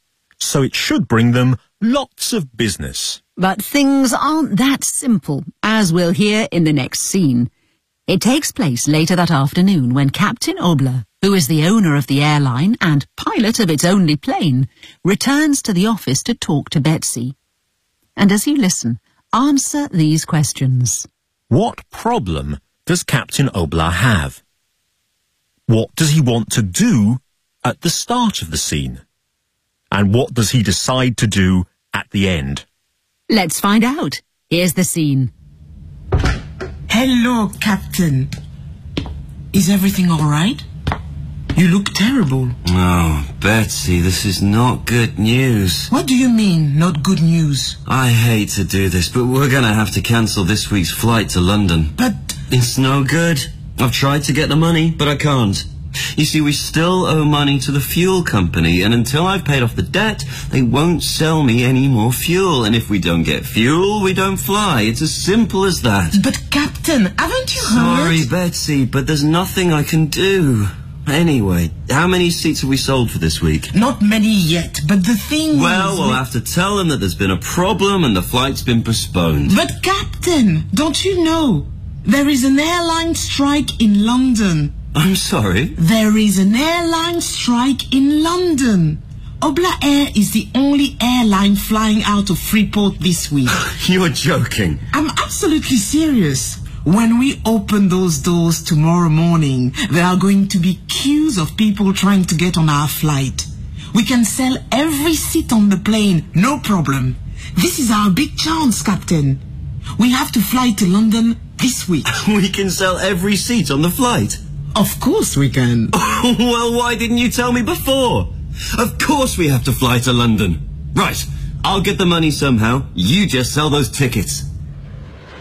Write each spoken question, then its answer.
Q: What problem does Captain Obla have?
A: He owes money to the fuel company.

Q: What does he want to do at the start of the scene?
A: He wants to cancel, to stop, this week's flight, because he hasn't got enough money to pay his fuel bill.

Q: And what does he decide to do at the end?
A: He decides they have to fly to London, because Betsy is sure they can sell every seat on the plane.